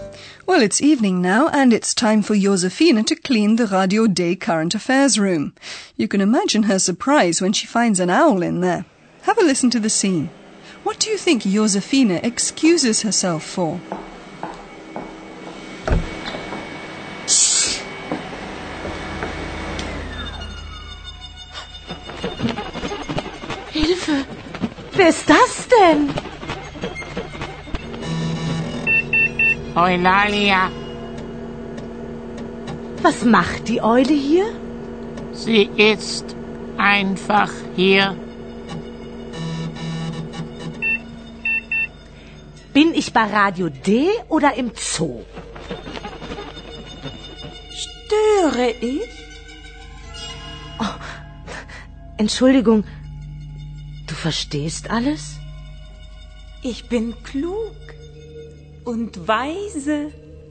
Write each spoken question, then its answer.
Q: What do you think Josefina excuses herself for?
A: Realizing that Eulalia can not only speak but apparently understands everything too, Josephine excuses herself.